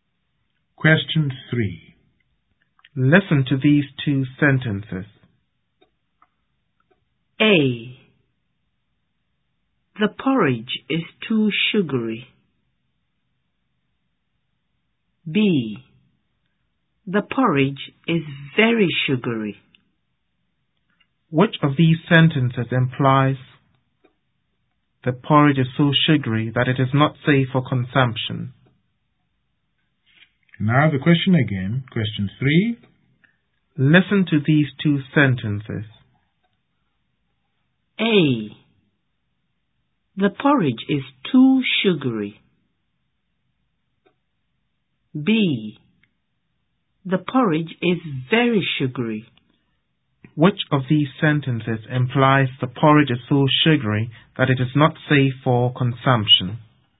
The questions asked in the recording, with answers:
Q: Which of these sentences implies the porridge is so sugary that it is not safe for consumption?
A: The porridge is too sugary.